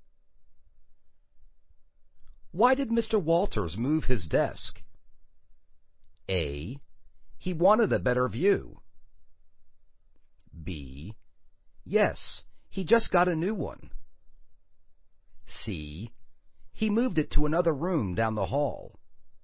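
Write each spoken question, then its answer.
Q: Why did Mr. Walters move his desk?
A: A: He wanted a better view.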